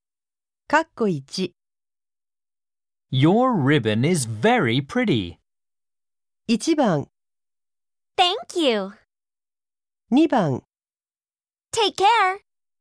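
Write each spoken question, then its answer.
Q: Your ribbon is very pretty.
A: 1: Thank you.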